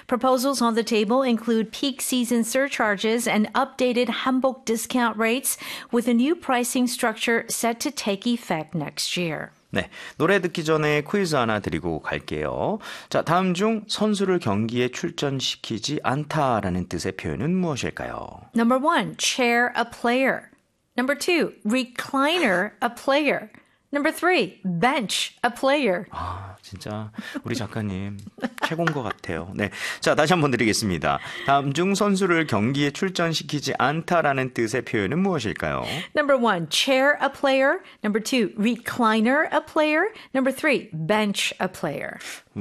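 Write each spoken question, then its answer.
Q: 다음 중 선수를 경기에 출전시키지 않다라는 뜻의 표현은 무엇일까요?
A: 3: bench a player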